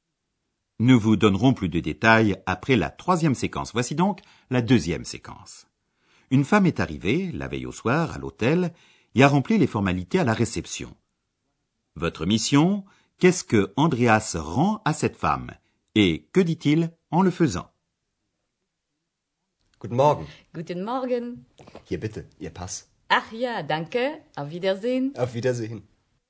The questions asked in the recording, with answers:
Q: Votre mission, qu'est-ce que Andreas rend à cette femme? Et que dit-il en le faisant?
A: Andreas rend à cette dame son passeport, qu'il avait pris la veille au soir pour le fichier de police.